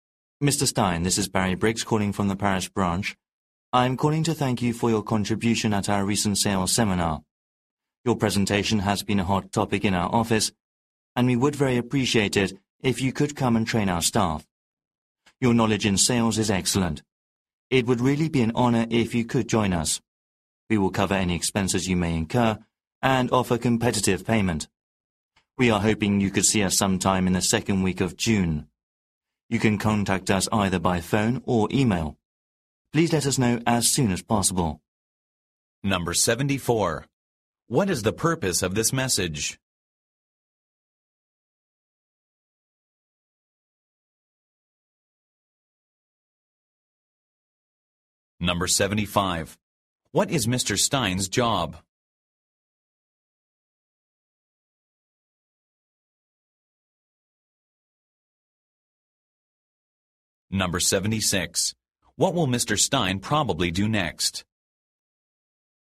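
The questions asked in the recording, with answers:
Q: What is the purpose of this message?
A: To invite Mr. Stein to come and train their staff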